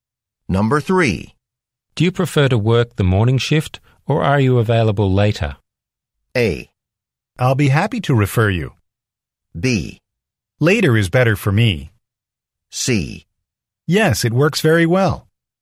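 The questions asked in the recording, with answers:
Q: Do you prefer to work the morning shift or are you available later?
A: B: Later is better for me.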